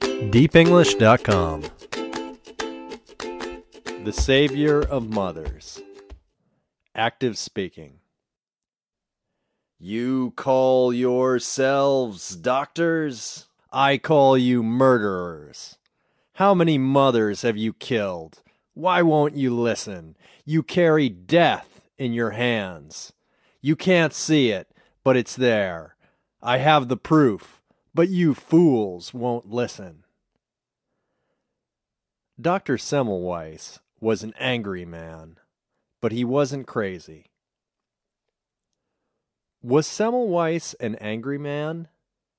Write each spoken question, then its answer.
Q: Was Semmelweis an angry man?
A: Yes, he was an angry man.